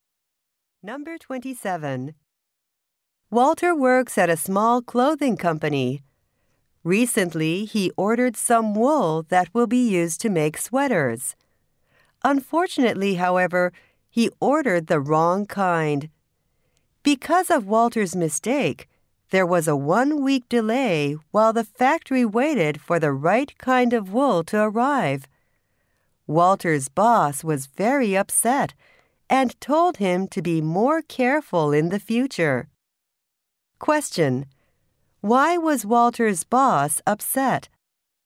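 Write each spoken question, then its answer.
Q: Question: Why was Walter's boss upset?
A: Walter ordered the wrong kind of wool, causing a delay.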